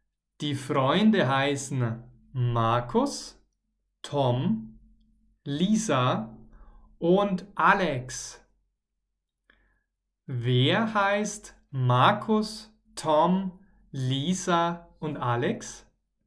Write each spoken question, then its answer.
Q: Wer heißt Markus, Tom, Lisa und Alex?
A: Die vier Freunde. Die vier Freunde heißen so.